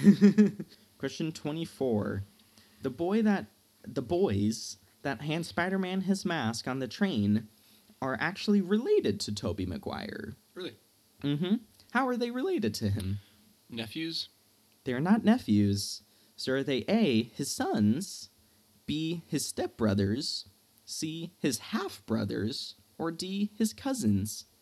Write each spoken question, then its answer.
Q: How are they related to him?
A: They were his half-brothers.